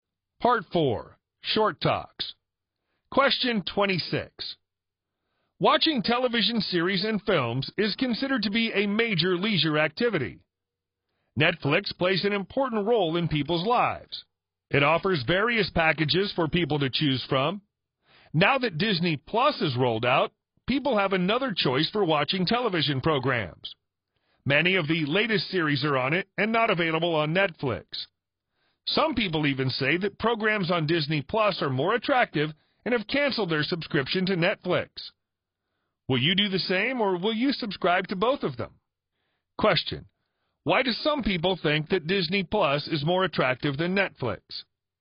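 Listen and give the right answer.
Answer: Many of the latest series are on Disney Plus and not available on Netflix.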